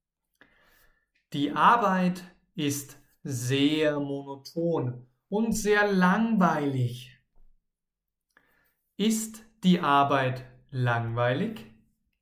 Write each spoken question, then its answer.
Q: Ist die Arbeit langweilig?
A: Ja. Leider, Ihre Arbeit ist sehr, sehr langweilig.